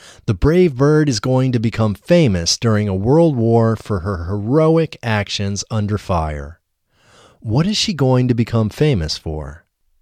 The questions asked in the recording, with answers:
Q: What is she going to become famous for?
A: She is going to become famous for her heroic actions under fire.